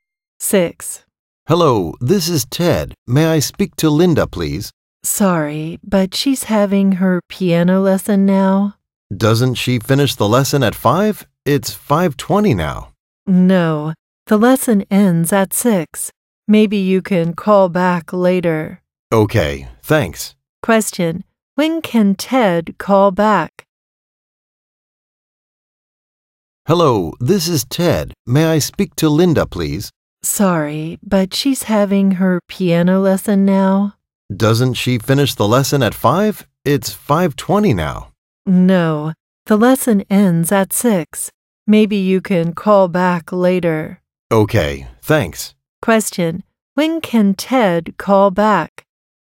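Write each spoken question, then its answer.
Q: when can Ted call back?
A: After 6 o'clock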